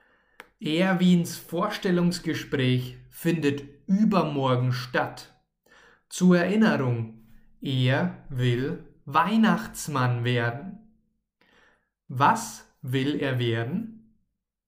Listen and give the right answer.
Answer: Weihnachtsmann. Er, also Erwin, will Weihnachtsmann werden.